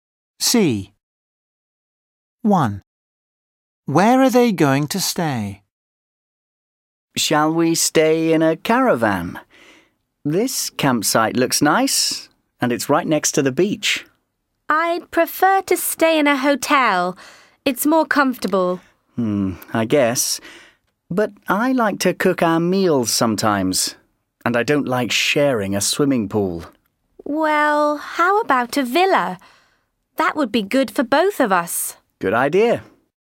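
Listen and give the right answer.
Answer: in a villa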